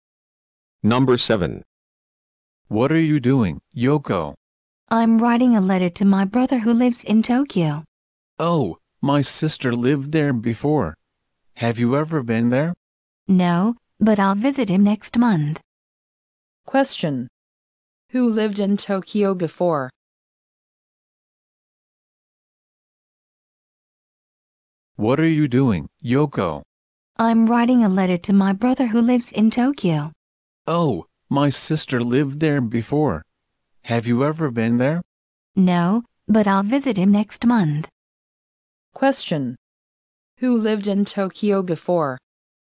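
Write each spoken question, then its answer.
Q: Who lived in Tokyo before?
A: The boy's sister.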